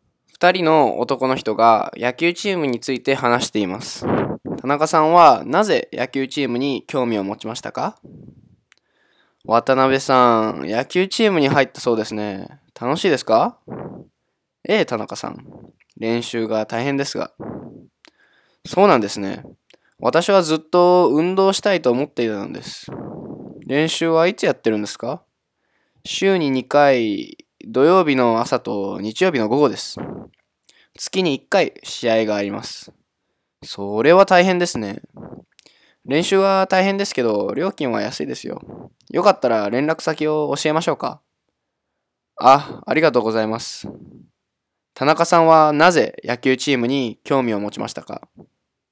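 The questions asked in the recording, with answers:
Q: 田中さんはなぜ野球チームに興味を持ちましたか?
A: ずっと運動したいと思っていたから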